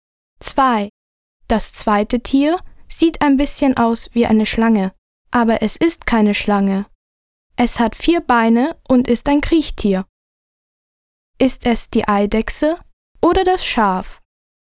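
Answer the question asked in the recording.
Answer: die Eidechse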